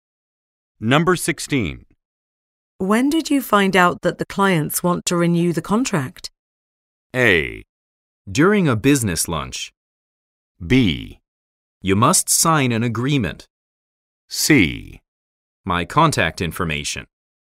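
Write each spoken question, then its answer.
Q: When did you find out that the clients want to renew the contract?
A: A: During a business lunch.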